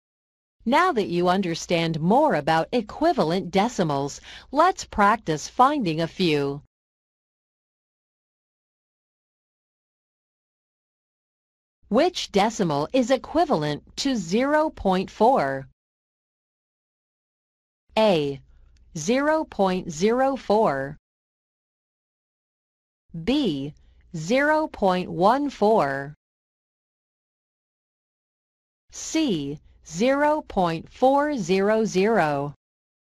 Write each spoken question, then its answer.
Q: Which decimal is equivalent to 0.4?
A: So the correct answer is 0.400.